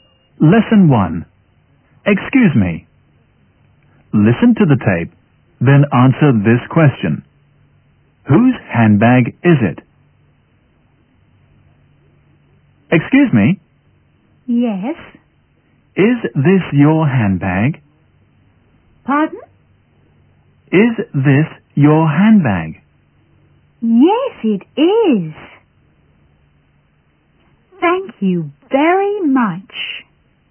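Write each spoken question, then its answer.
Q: Whose handbag is it?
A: It belongs to the woman who was asked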